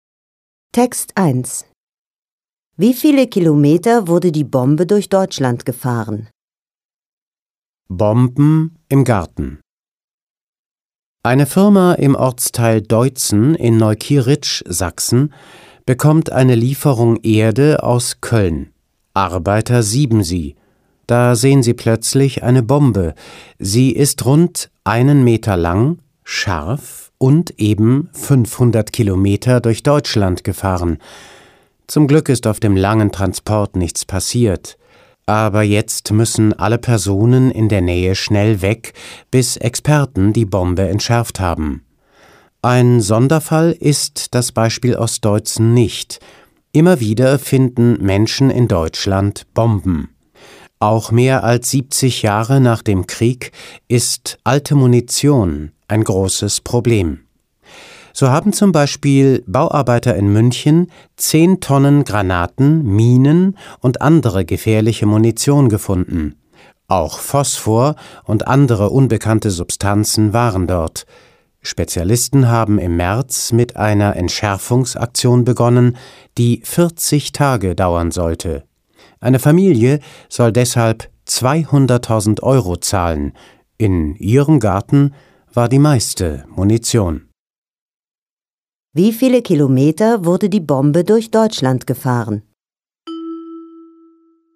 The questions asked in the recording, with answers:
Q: Wie viele Kilometer wurde die Bombe durch Deutschland gefahren?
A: Sie wurde 500 Kilometer durch Deutschland gefahren.